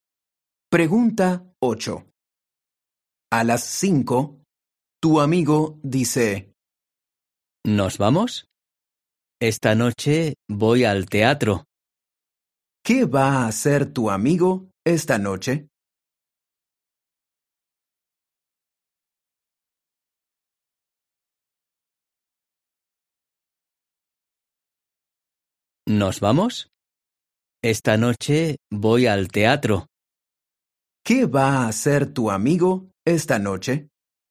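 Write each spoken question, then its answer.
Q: ¿Qué va a hacer tu amigo esta noche?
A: Ir al teatro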